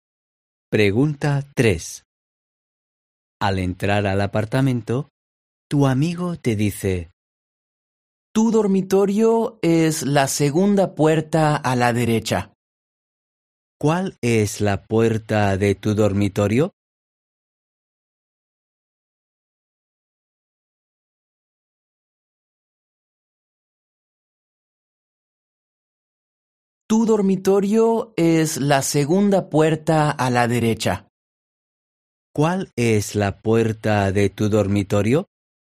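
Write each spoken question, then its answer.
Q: ¿Cuál es la puerta de tu dormitorio?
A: la segunda puerta a la derecha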